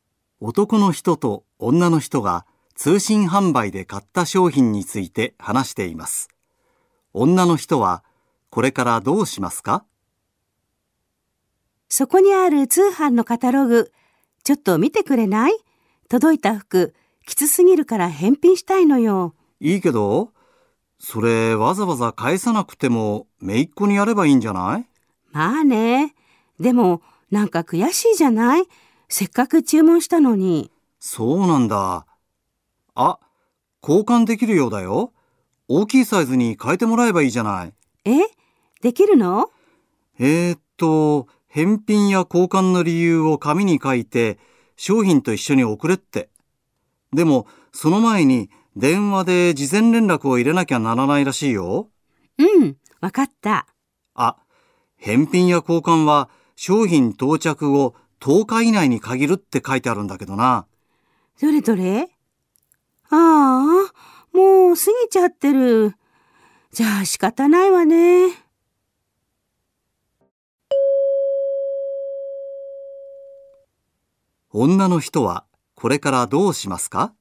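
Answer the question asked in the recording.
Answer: 服を姪っ子にあげる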